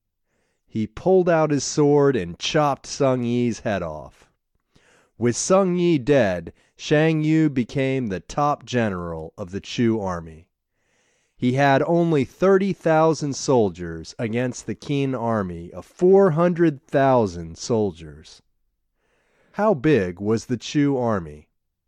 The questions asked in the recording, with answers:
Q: How big was the Chu army?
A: The Chu army had 30,000 soldiers.